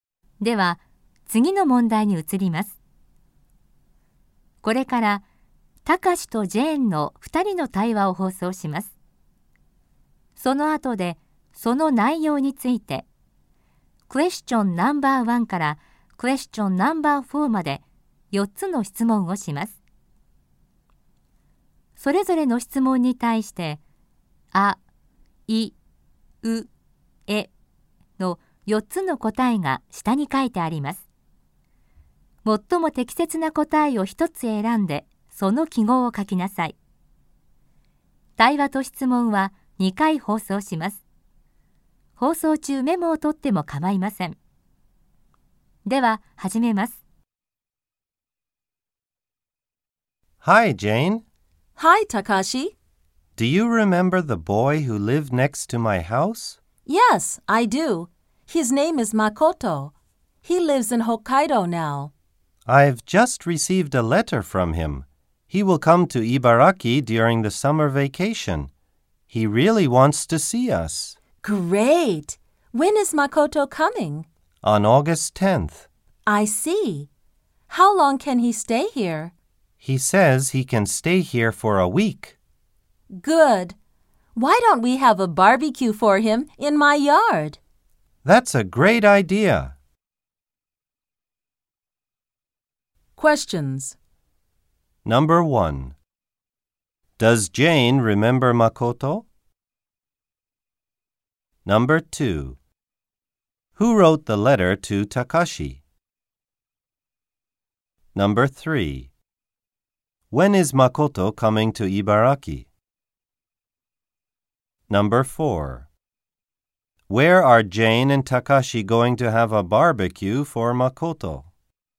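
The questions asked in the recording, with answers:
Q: Does Jane remember Makoto?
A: Yes, she does.

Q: Who wrote the letter to Takashi?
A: Makoto

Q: When is Makoto coming to Ibaraki?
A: On August 10th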